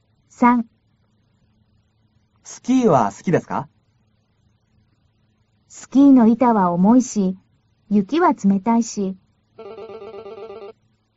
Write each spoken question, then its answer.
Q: スキーは好きですか?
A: スキーの板は重いし、雪は冷たいし、好きじゃありません。